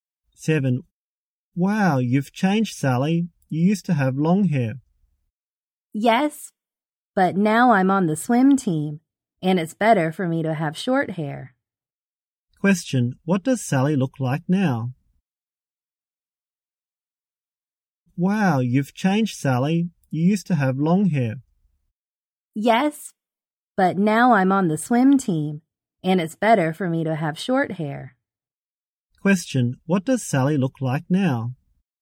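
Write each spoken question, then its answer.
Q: What does Sally look like now?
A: She has short hair.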